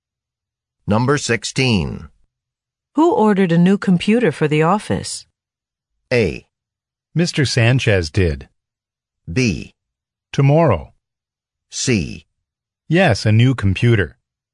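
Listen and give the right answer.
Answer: A: Mr. Sanchez did.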